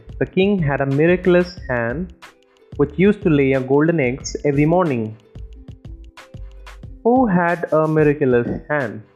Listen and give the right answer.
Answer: The king. The king had a miraculous hand.